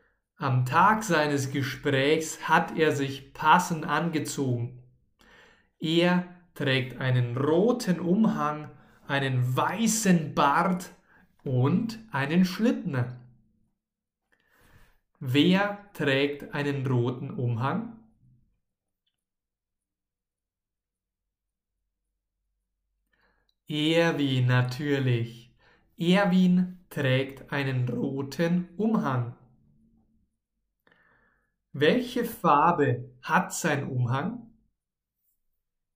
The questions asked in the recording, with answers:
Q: Welche Farbe hat sein Umhang?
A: Rot. Sein Umhang hat die Farbe Rot.